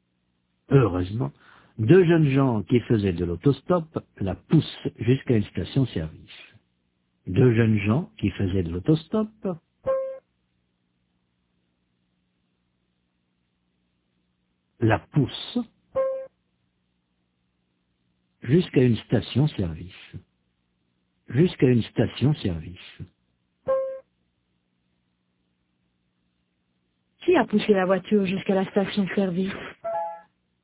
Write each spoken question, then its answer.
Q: Qui a poussé la voiture jusqu'à la station-service ?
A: Deux jeunes gens qui faisaient de l'autostop.